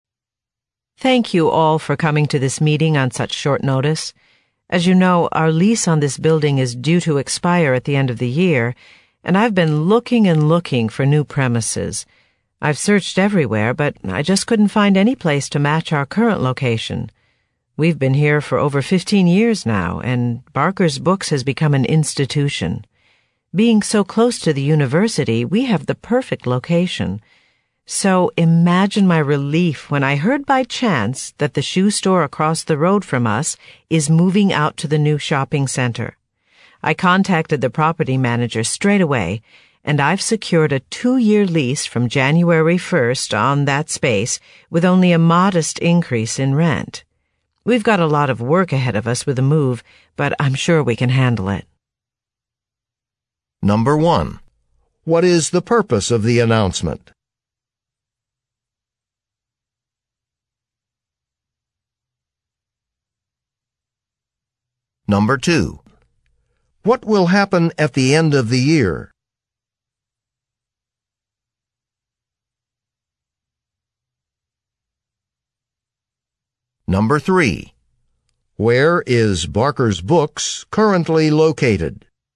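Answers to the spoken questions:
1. To announce the bookstore is moving to a new location across the road
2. The lease on the building will expire
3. Near the university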